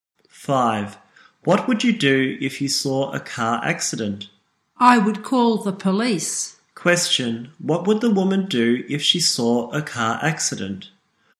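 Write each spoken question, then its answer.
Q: What would the woman do if she saw a car accident?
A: Call the police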